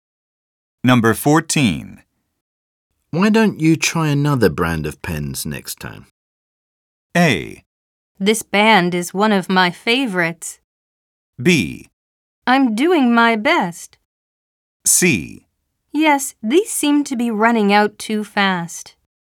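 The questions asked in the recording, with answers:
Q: Why don't you try another brand of pens next time?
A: C: Yes, these seem to be running out too fast.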